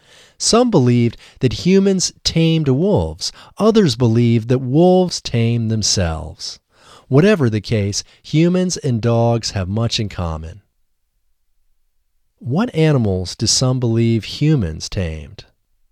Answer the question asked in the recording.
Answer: Some believe that humans tamed wolves.